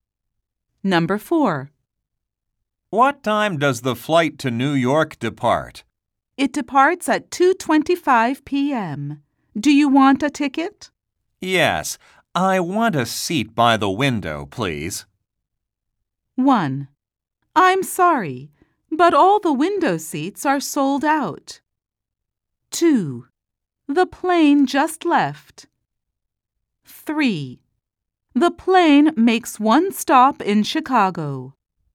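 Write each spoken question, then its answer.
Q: Yes. I want a seat by the window, please.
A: 1: I'm sorry, but all the window seats are sold out.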